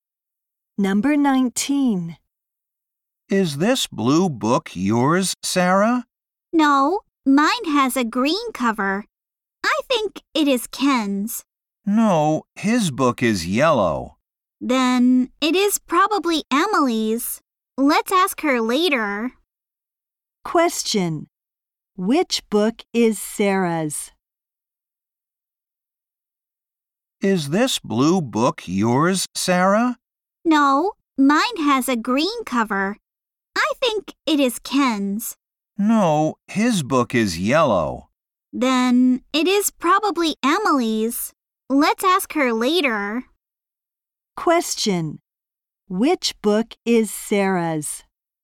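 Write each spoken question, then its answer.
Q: Which book is Sarah's?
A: The green one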